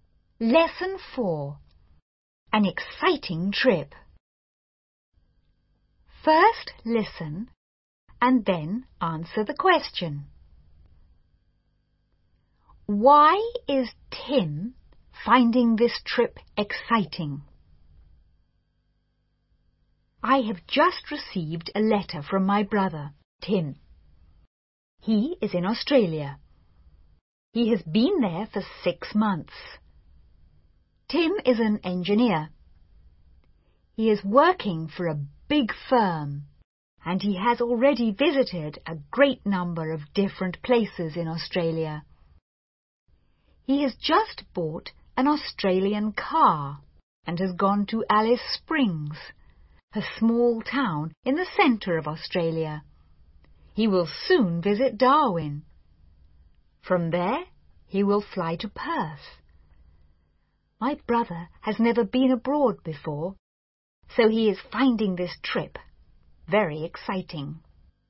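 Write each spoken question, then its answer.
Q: Why is Tim finding this trip exciting?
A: Because he has never been abroad before.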